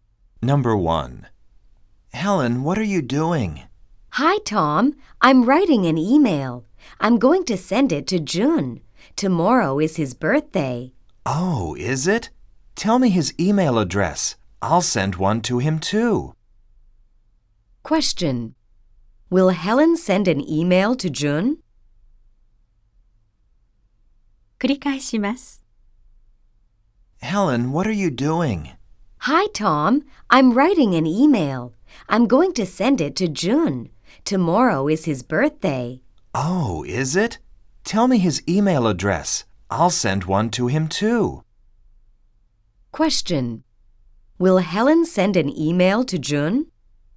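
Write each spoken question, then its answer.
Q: Will Helen send an email to June?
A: Yes, she will.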